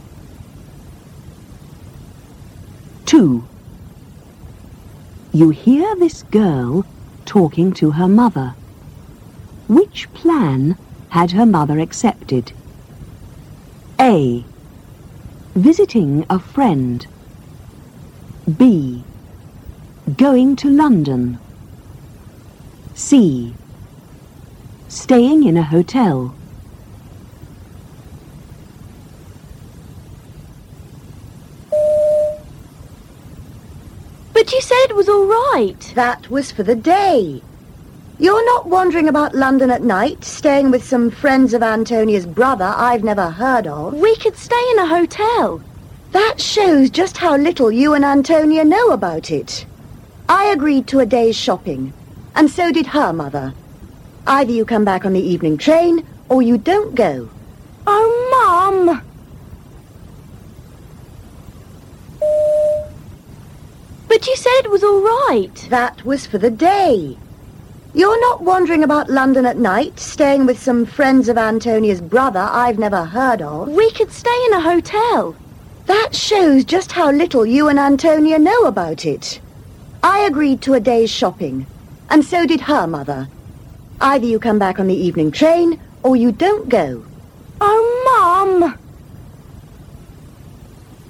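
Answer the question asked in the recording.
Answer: B: Going to London.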